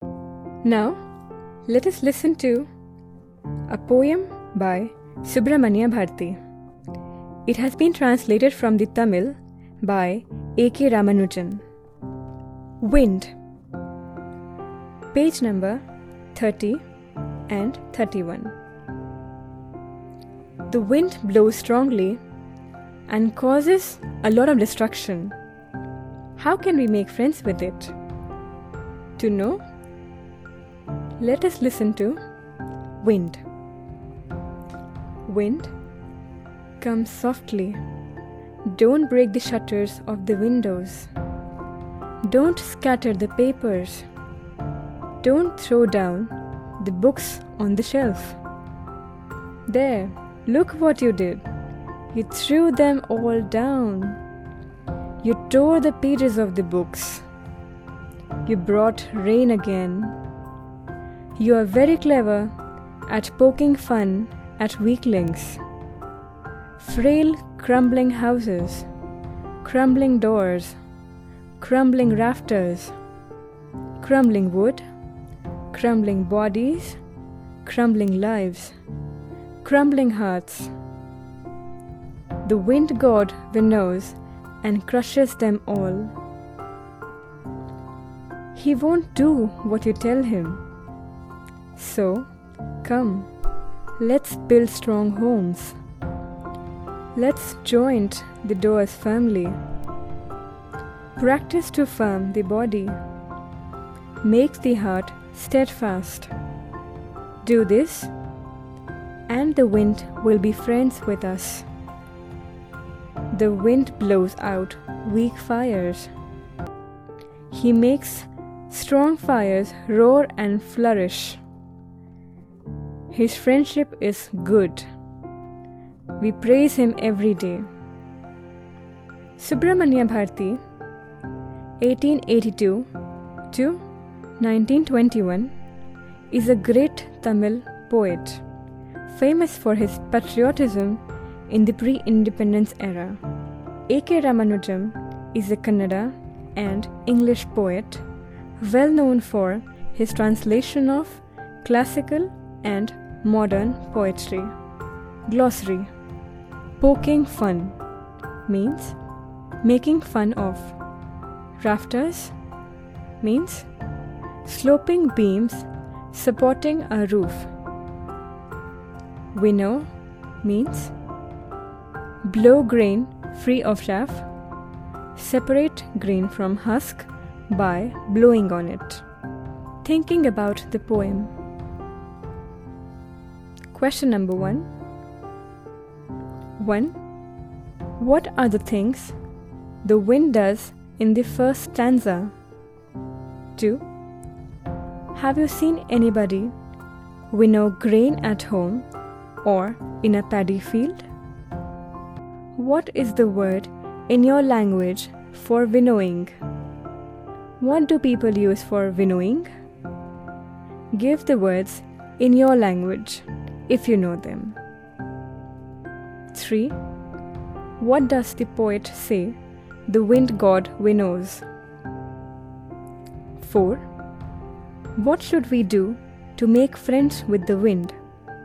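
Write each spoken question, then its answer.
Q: What are the things the wind does in the first stanza?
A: It breaks the window shutters, scatters the papers, throws down the books from the shelf, tears their pages and brings rain.

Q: What does the poet say the wind god winnows?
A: Frail, crumbling houses, doors, rafters, wood, bodies, lives and hearts.

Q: What should we do to make friends with the wind?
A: Build strong homes, join the doors firmly, make the body strong and the heart steadfast.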